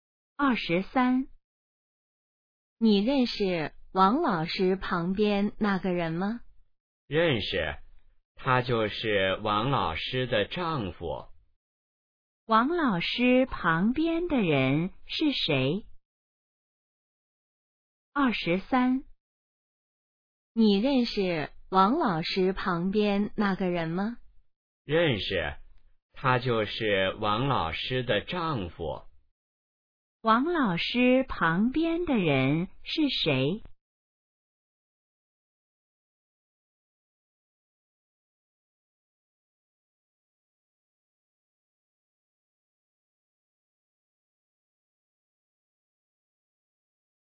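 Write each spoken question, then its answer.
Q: 王老师旁边的人是谁?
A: 王老师的丈夫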